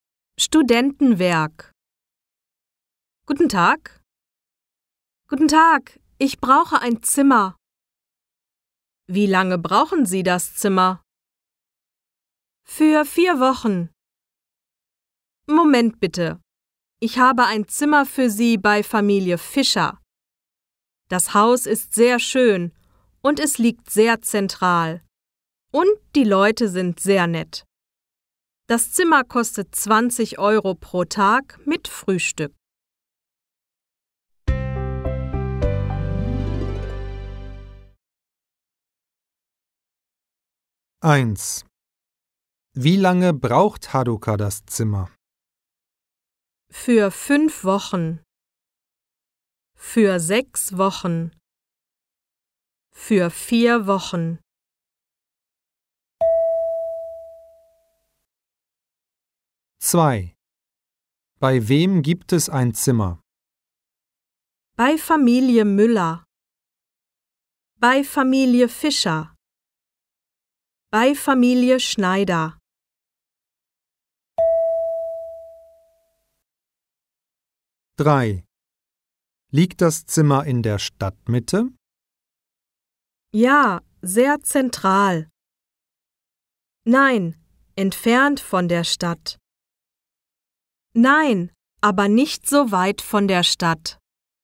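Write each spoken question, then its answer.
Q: Wie lange braucht Haruka das Zimmer?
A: Für 4 Wochen.

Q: Bei wem gibt es ein Zimmer?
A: Bei Familie Fischer.

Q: Liegt das Zimmer in der Stadtmitte?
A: Ja, sehr zentral.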